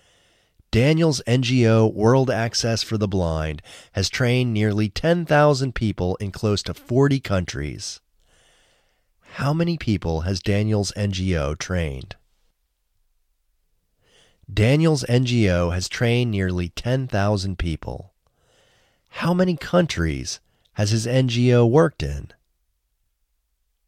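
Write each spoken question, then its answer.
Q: How many people has Daniel's NGO trained?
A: Nearly 10,000.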